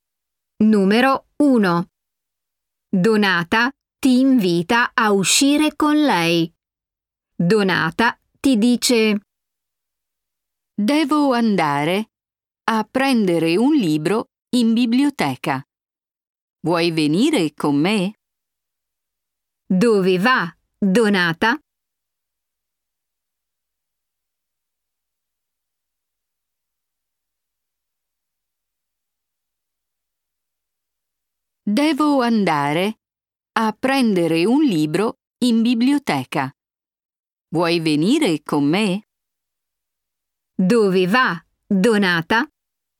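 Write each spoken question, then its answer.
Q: Dove va Donata?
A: in biblioteca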